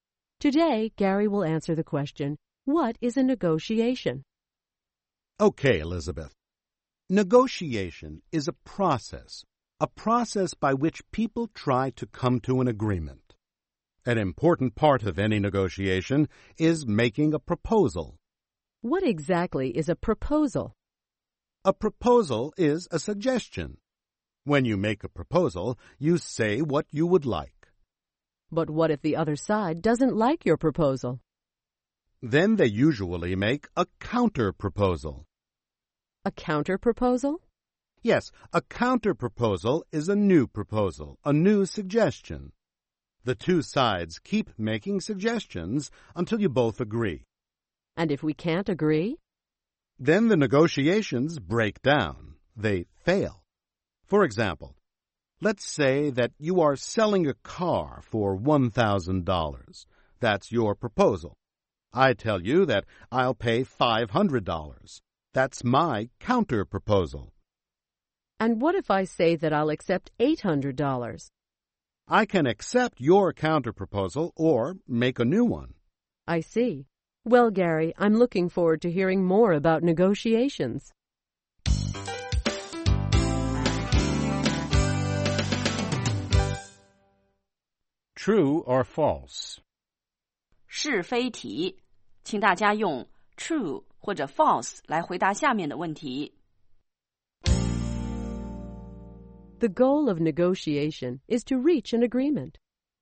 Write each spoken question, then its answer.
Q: The goal of negotiation is to reach an agreement.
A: True. People offer proposals and counterproposals in an attempt to reach an agreement.